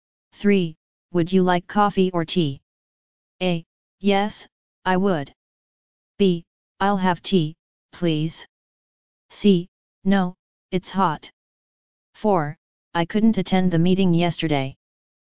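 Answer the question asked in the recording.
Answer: B: I'll have tea, please.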